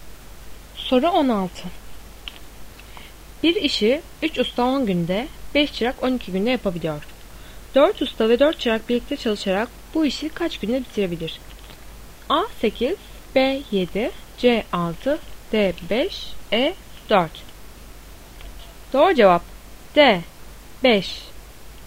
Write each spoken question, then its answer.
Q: 4 usta ve 4 çırak birlikte çalışarak bu işi kaç günde bitirebilir?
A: Doğru cevap D5.